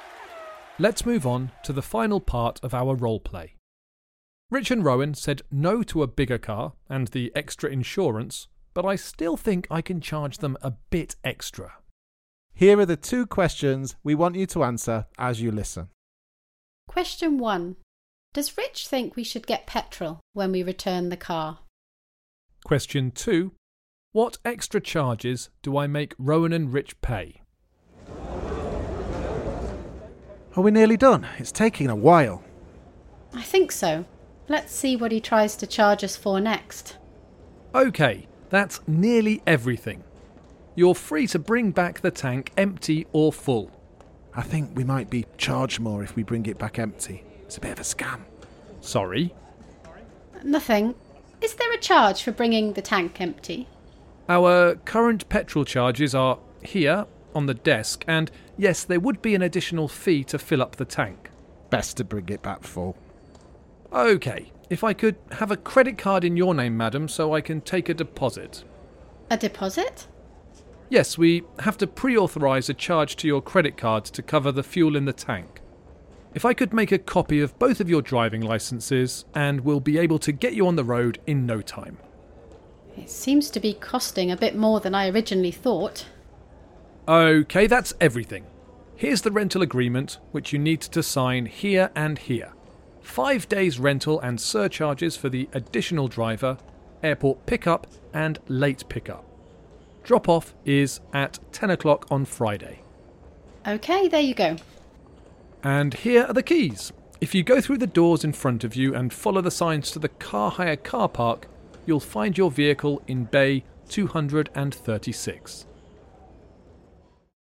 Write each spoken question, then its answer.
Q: Does Rich think we should get petrol when we return the car?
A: The answer is yes.

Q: What extra charges do I make Rowan and Rich pay?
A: I make them pay extra for an additional driver and for renting the car from the airport.